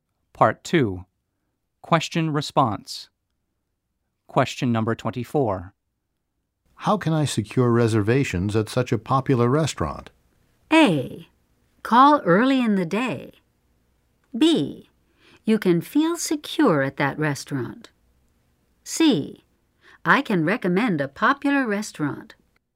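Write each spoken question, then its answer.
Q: How can I secure reservations at such a popular restaurant?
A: A: Call early in the day.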